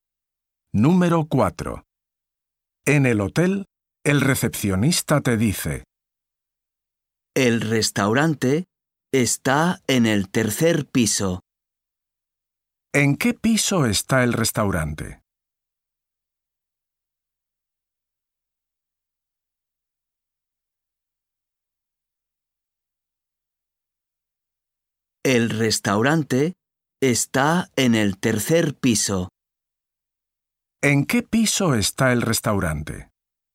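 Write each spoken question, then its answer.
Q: ¿En qué piso está el restaurante?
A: En el tercer piso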